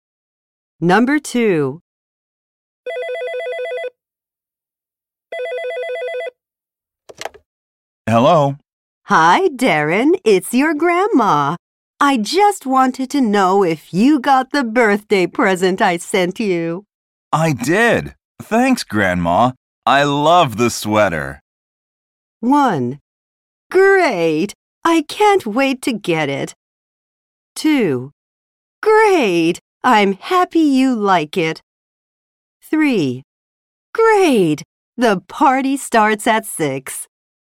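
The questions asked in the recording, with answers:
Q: I did. Thanks, Grandma. I love the sweater.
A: 2: Great. I'm happy you like it.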